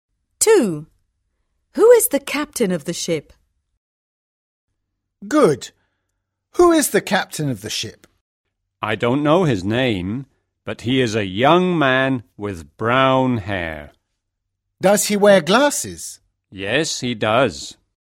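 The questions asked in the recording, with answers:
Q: Who is the captain of the ship?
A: A young man with brown hair and glasses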